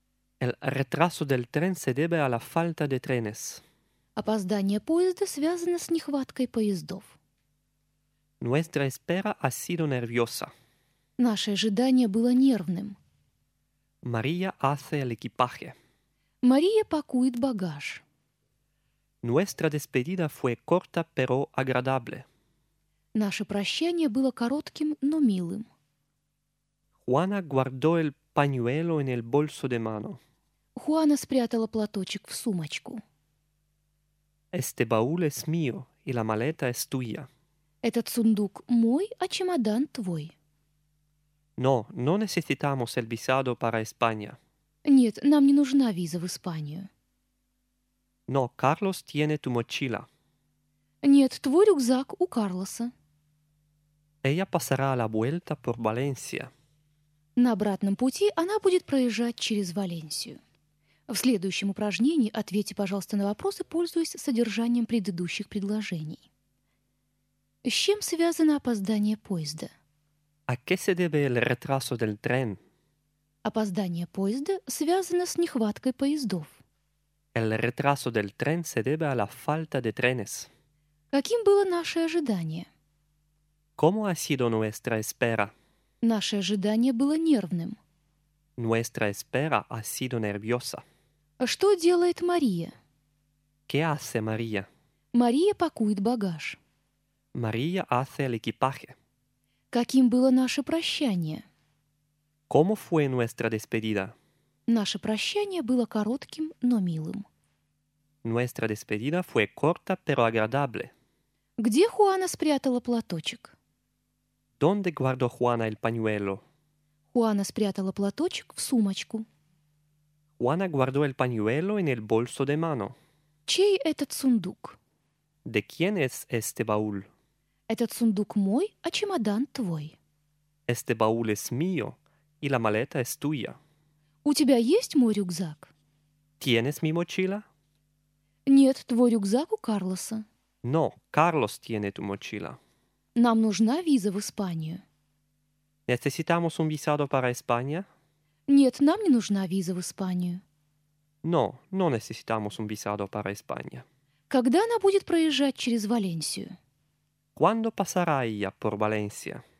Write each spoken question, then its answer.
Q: ¿A qué se debe el retraso del tren?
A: El retraso del tren se debe a la falta de trenes.

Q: ¿Cómo ha sido nuestra espera?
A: Nuestra espera ha sido nerviosa.

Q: ¿Qué hace María?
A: María hace el equipaje.

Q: ¿Cómo fue nuestra despedida?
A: Nuestra despedida fue corta, pero agradable.

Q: ¿Dónde guardó Juana el pañuelo?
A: Juana guardó el pañuelo en el bolso de mano.

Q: ¿De quién es este baúl?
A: Este baúl es mío y la maleta es tuya.

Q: ¿Tienes mi mochila?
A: No, Carlos tiene tu mochila.

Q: ¿Cuándo pasará ella por Valencia?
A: Ella pasará la vuelta por Valencia.